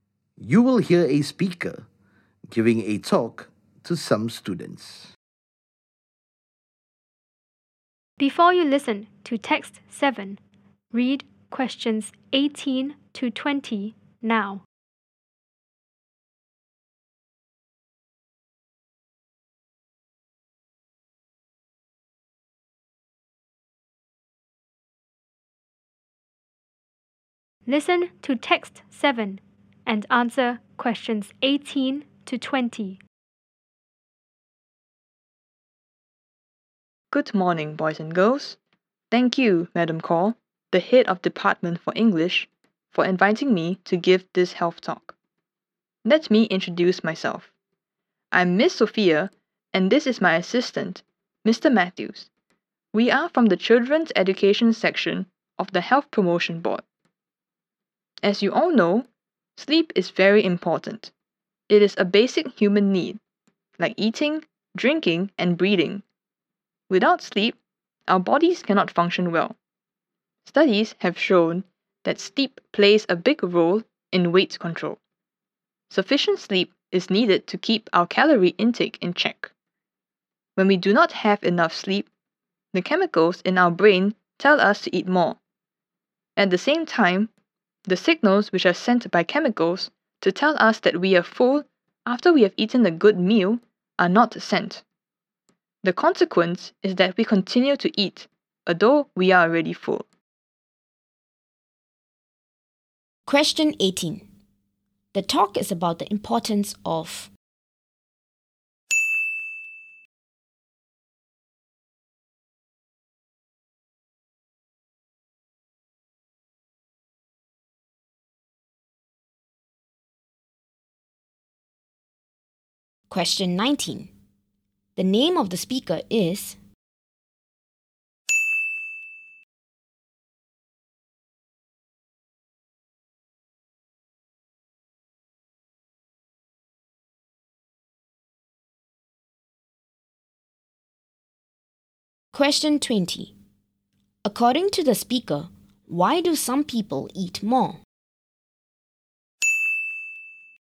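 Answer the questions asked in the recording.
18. sleep
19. Miss Sophia
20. They do not have enough sleep, so brain chemicals tell them to eat more and the signals that they are full are not sent.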